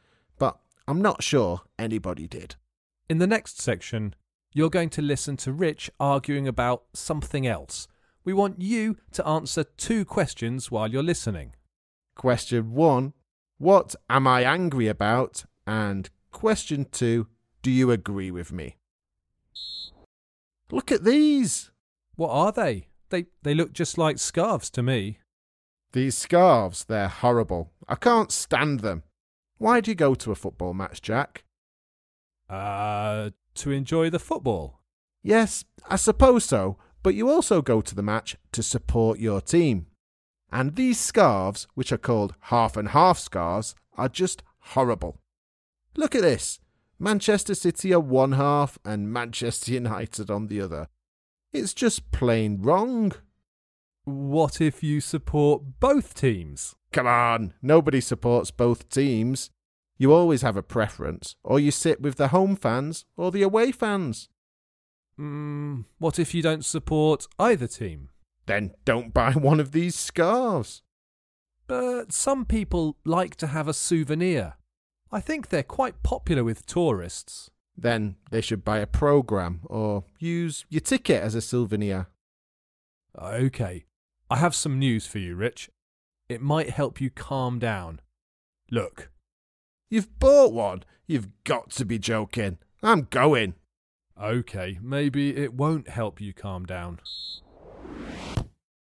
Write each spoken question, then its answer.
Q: Question one, what am I angry about?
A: Rich was complaining about half and half scarves and arguing that they shouldn't exist.